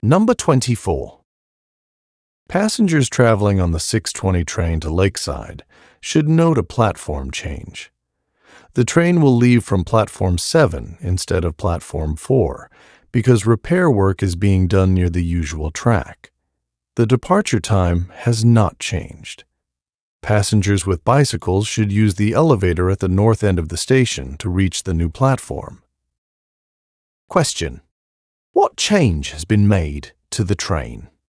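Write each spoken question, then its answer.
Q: What change has been made to the train?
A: It will leave from Platform 7 instead of Platform 4.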